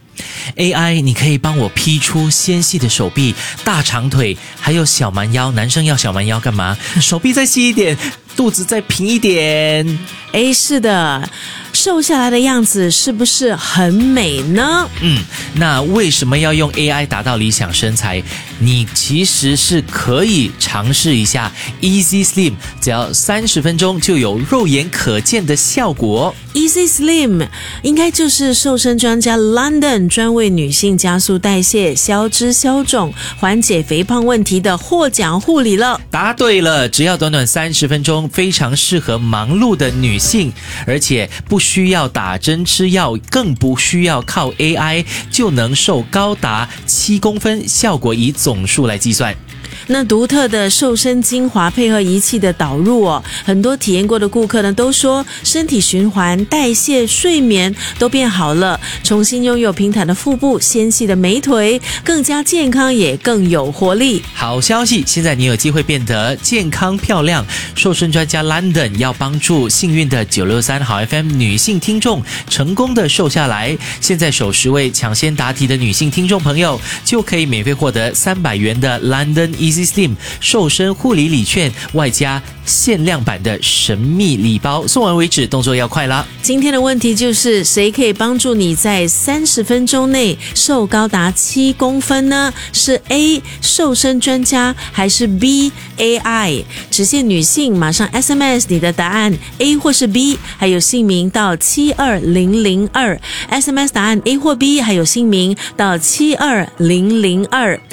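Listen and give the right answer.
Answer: A: 瘦身专家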